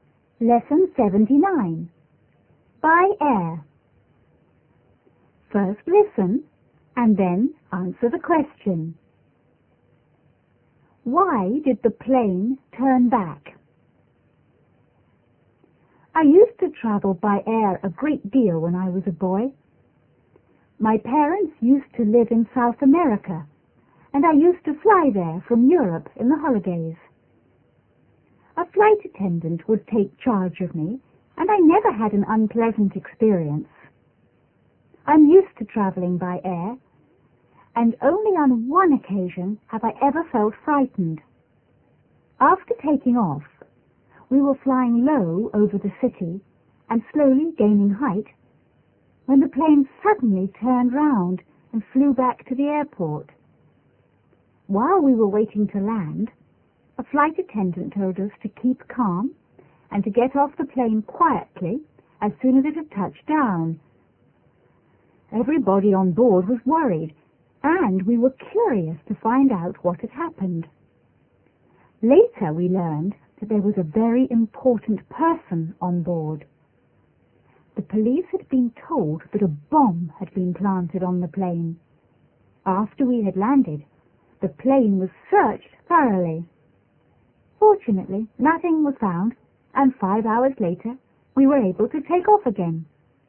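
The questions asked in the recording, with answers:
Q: Why did the plane turn back?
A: The police had been told that a bomb had been planted on the plane.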